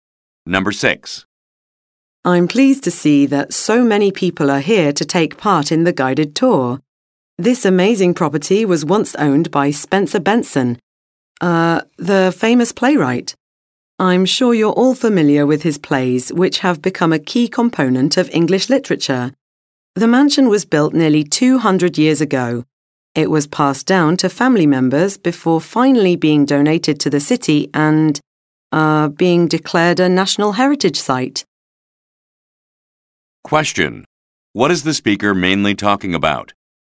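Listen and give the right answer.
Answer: The history of a mansion once owned by the playwright Spencer Benson, seen on a guided tour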